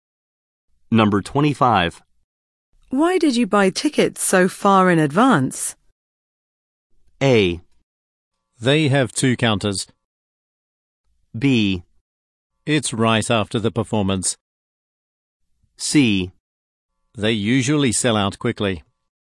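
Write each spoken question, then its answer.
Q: Why did you buy tickets so far in advance?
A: C: They usually sell out quickly.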